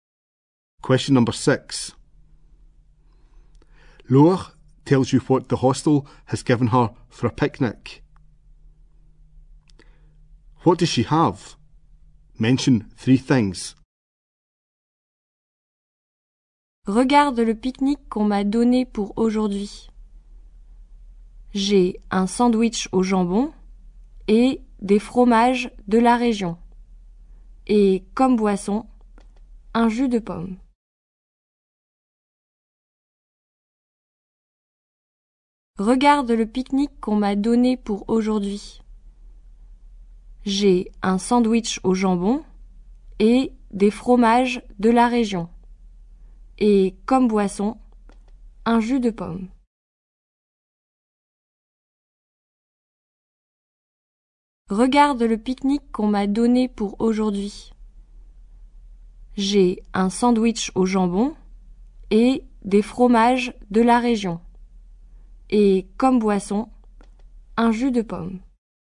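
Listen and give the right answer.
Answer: A ham sandwich, local cheeses, apple juice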